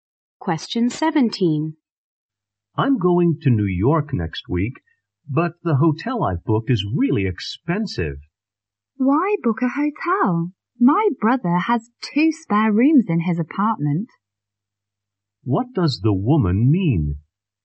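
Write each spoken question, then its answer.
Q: What does the woman mean?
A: The man can stay at her brother's apartment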